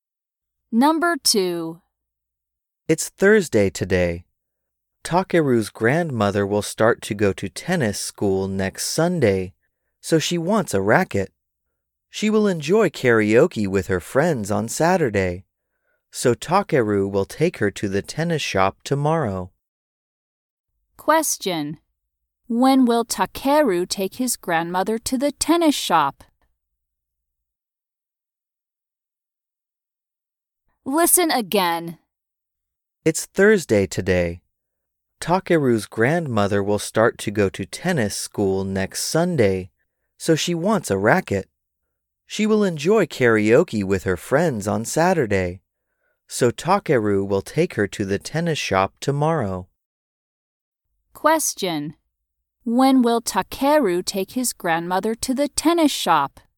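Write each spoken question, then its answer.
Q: When will Takeru take his grandmother to the tennis shop?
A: On Friday (tomorrow).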